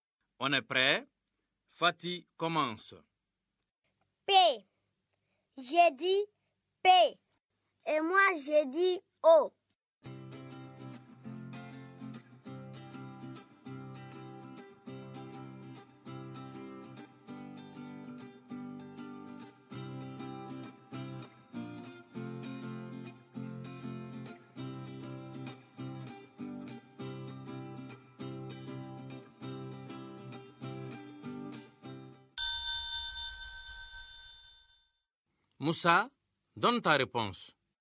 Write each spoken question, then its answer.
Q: Moussa, donne ta réponse.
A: Monsieur, c'est pot.